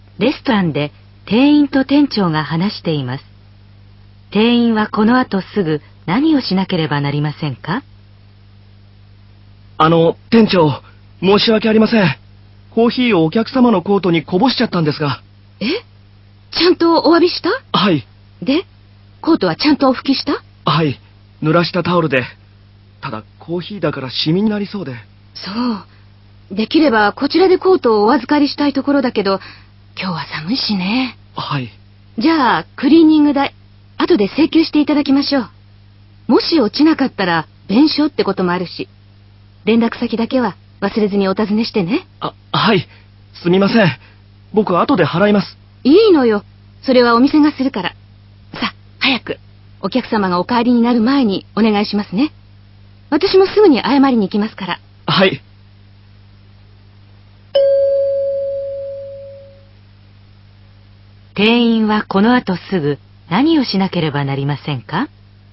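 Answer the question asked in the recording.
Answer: お客様の連絡先を尋ねる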